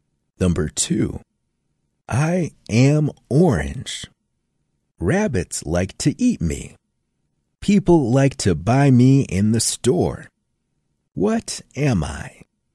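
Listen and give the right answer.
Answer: a carrot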